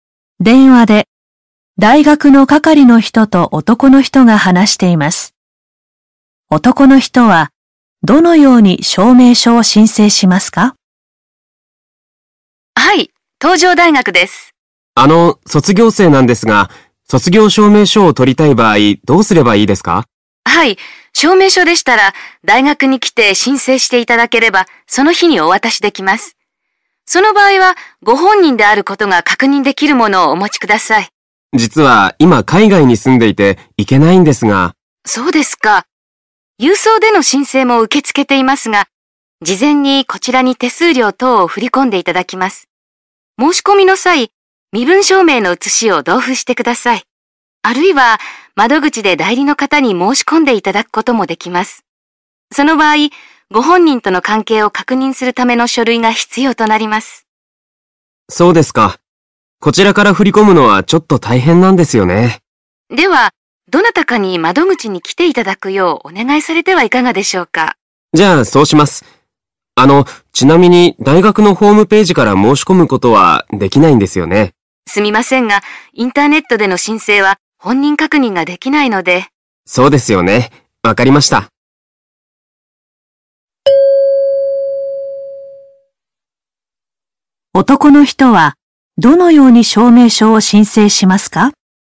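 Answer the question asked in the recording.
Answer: 代理の人に大学の窓口で申請してもらう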